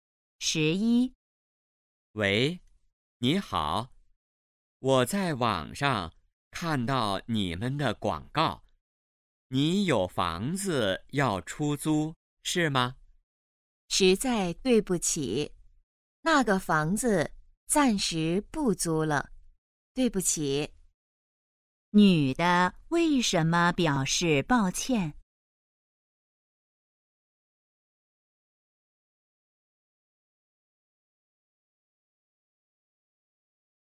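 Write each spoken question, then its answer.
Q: 女的为什么表示抱歉?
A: 房子暂时不租了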